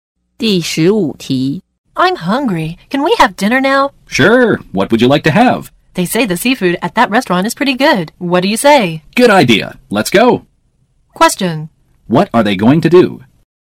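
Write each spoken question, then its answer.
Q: What are they going to do?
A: Go to eat seafood at a restaurant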